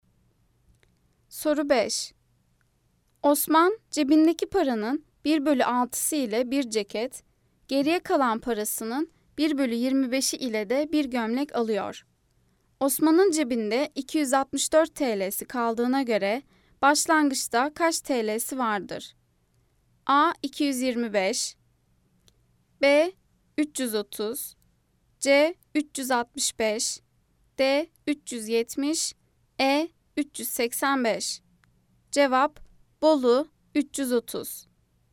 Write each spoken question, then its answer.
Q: Osman'ın cebinde 264 TL'si kaldığına göre başlangıçta kaç TL'si vardır?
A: Cevap Bolu 330.